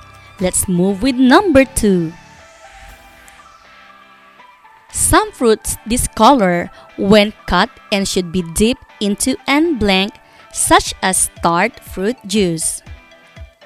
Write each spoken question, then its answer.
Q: Some fruits discolor when cut and should be dipped into an blank such as tart fruit juice.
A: Yes, the correct answer is acid.